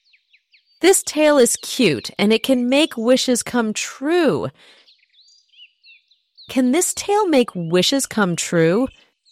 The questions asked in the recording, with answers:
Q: Can this tail make wishes come true?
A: Yes, it can. It can make wishes come true.